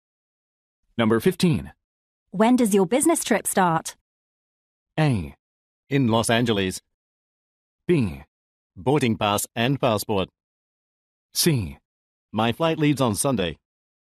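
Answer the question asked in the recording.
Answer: C: My flight leaves on Sunday.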